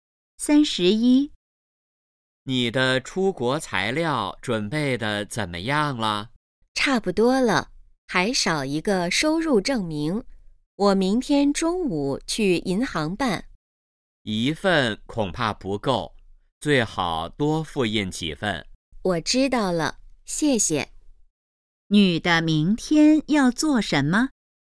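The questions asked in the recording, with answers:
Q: 女的明天要做什么?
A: 去银行办收入证明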